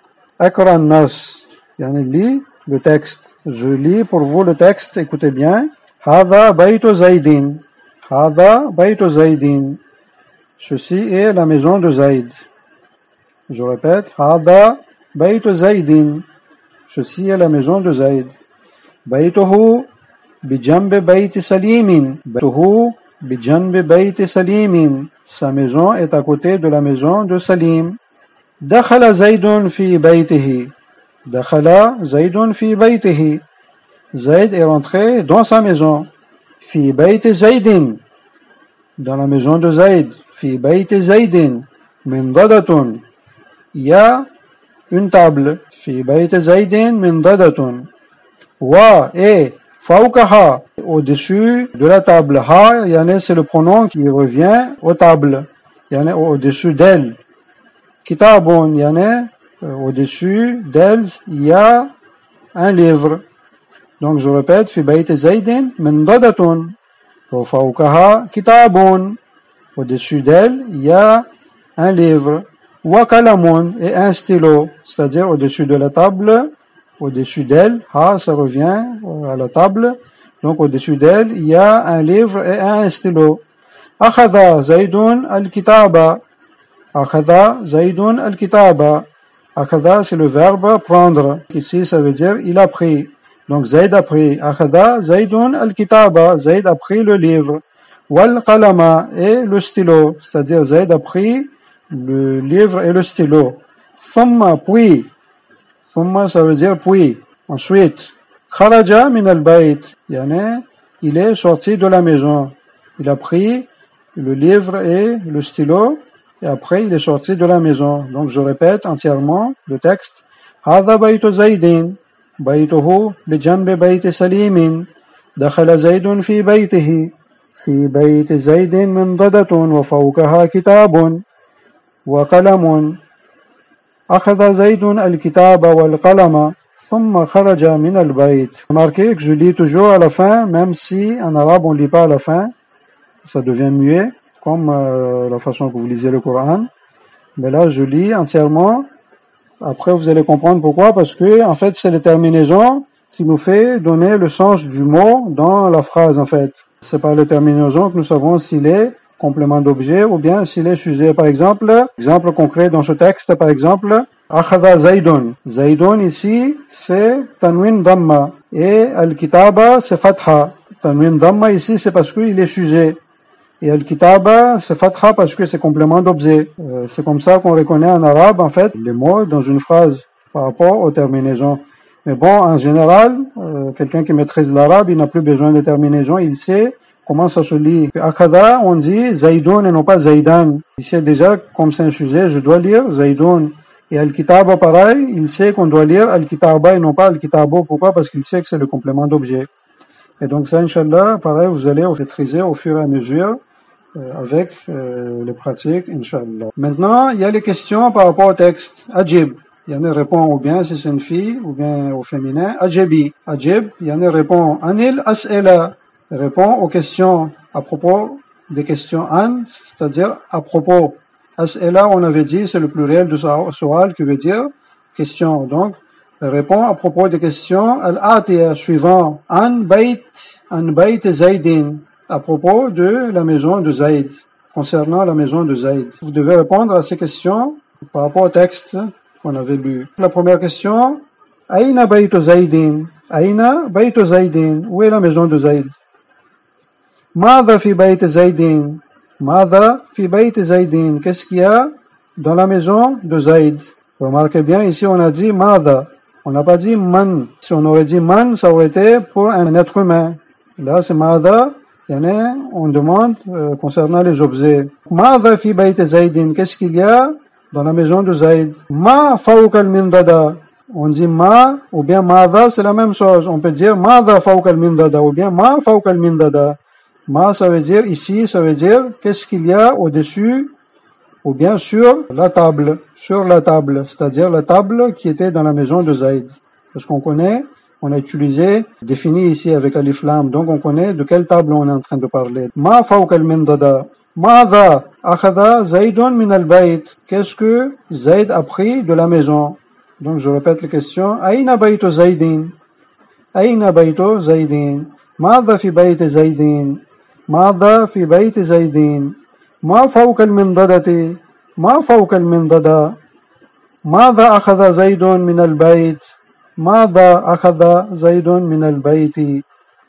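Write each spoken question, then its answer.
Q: Aina Bayt Zaydin. Où est la maison de Zayd?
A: À côté de la maison de Salim

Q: Mada fi bayt Zaydin. Qu'est-ce qu'il y a dans la maison de Zayd?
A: Une table

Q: Ma fauk al-mindada.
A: Un livre et un stylo

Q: Ma'adha akhada Zaydun min al-bayt.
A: Le livre et le stylo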